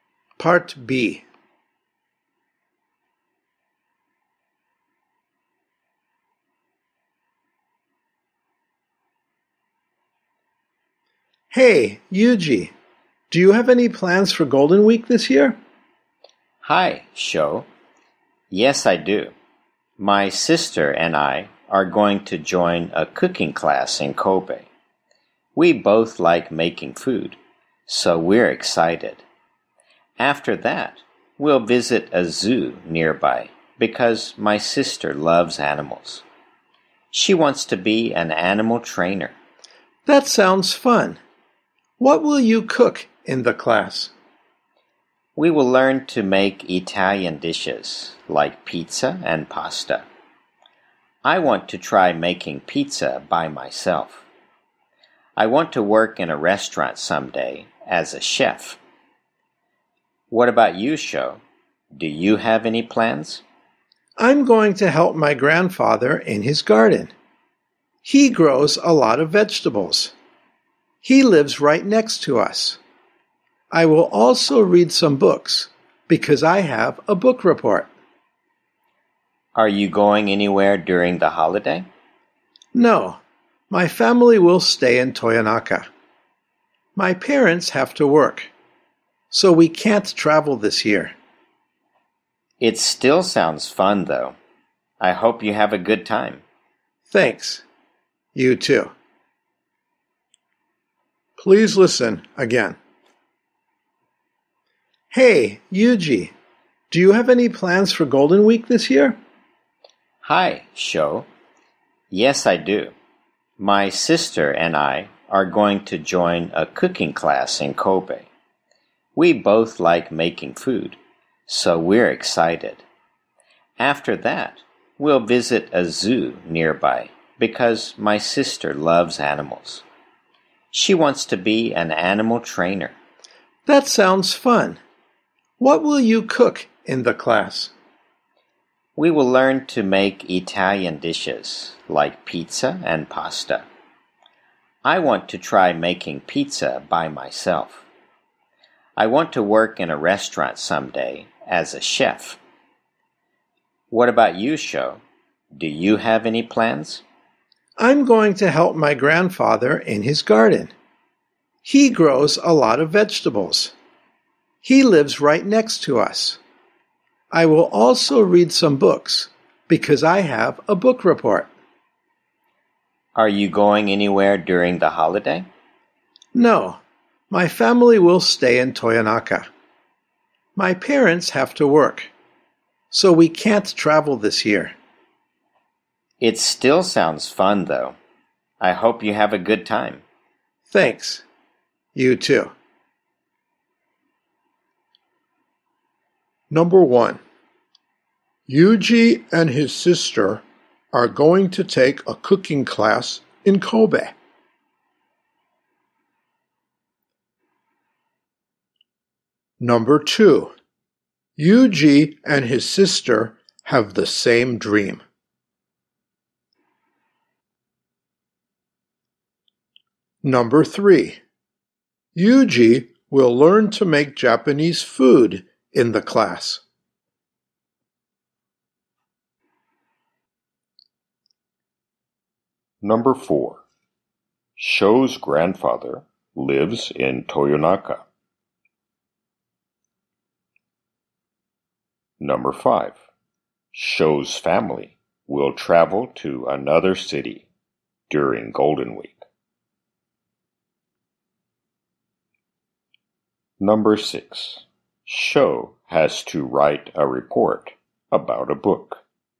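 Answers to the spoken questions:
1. True
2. False
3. False
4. True
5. False
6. True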